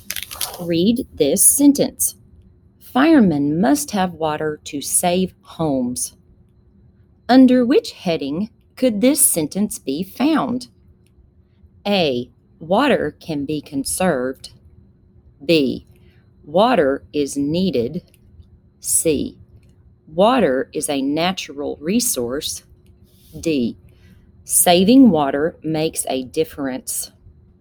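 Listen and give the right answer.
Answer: B: Water is needed.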